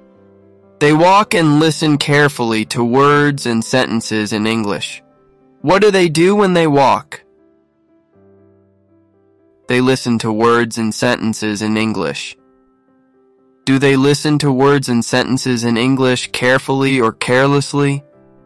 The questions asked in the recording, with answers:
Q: Do they listen to words and sentences in English carefully or carelessly?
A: Carefully. They listen very carefully.